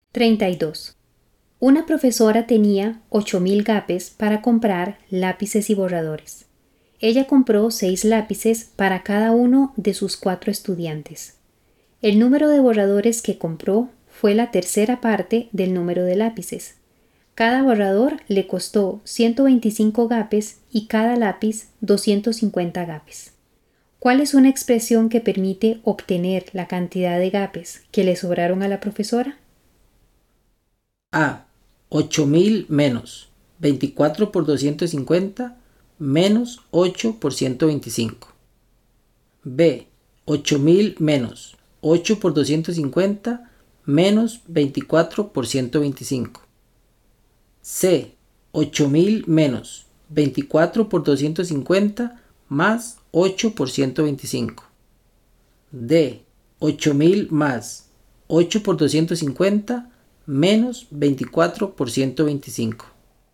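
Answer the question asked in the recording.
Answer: A: 8.000 menos 24 por 250 menos 8 por 125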